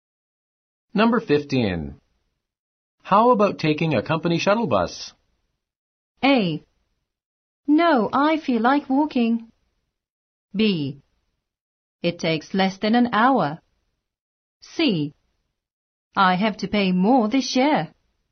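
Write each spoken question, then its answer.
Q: How about taking a company shuttle bus?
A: A: No, I feel like walking.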